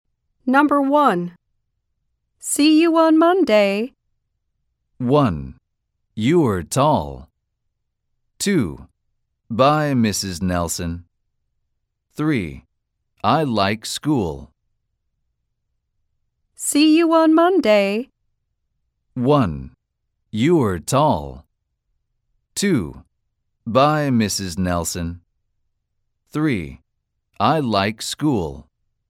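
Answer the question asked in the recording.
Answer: 2: Bye, Mrs. Nelson.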